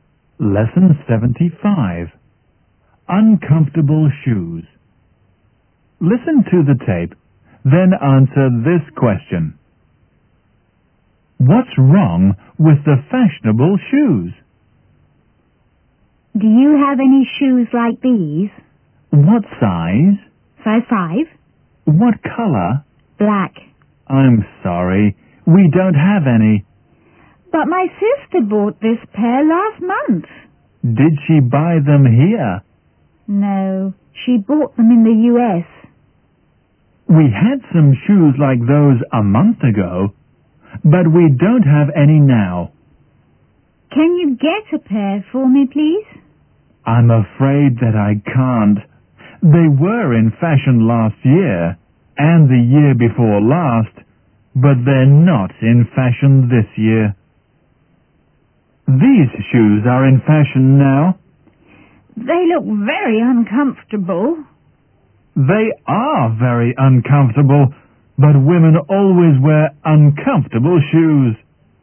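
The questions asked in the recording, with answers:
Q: What's wrong with the fashionable shoes?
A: They are very uncomfortable.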